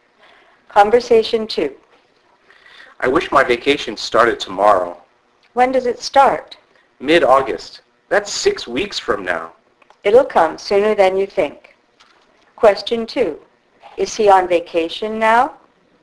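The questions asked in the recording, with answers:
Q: Is he on vacation now?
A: No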